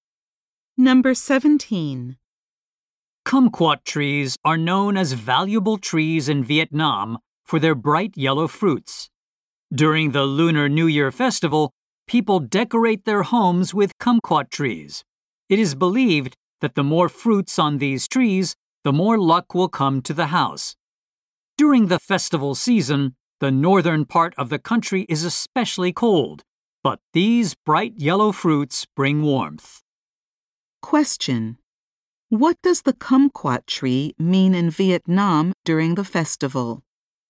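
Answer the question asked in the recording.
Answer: It brings luck (and warmth) to the home.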